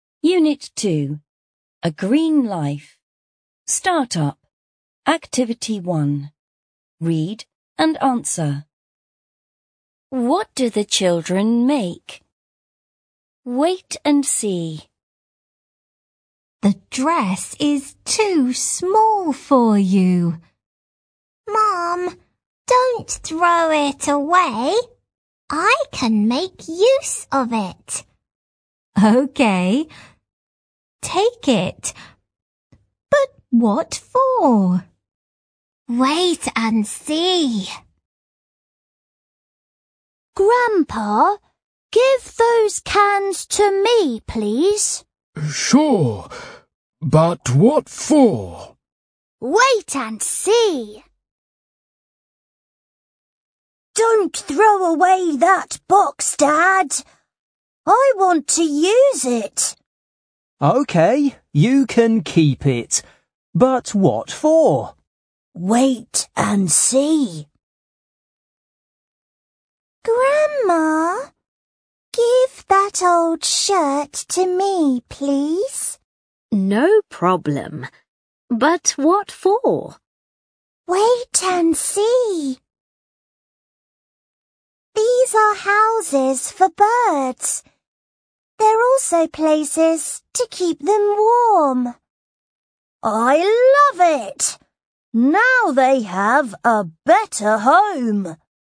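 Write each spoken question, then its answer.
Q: What do the children make?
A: Houses for birds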